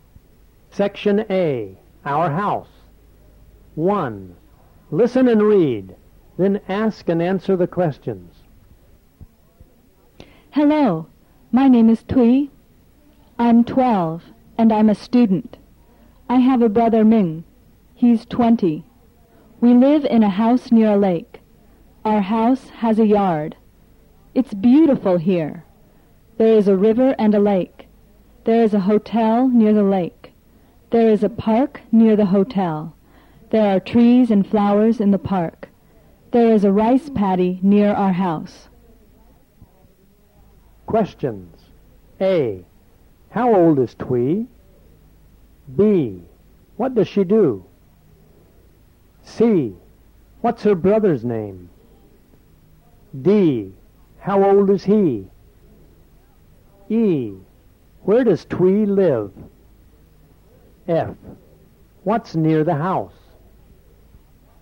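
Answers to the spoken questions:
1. 12
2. She's a student
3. Ming
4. 20
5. In a house near a lake
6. A rice paddy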